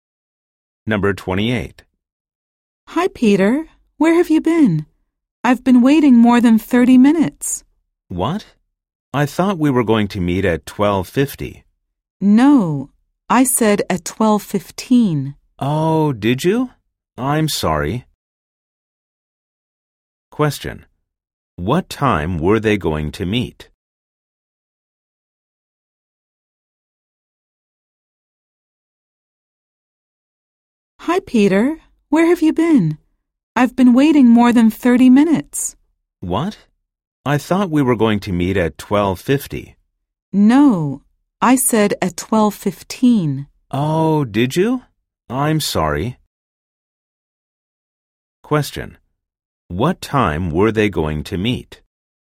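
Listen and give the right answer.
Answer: At 12:15.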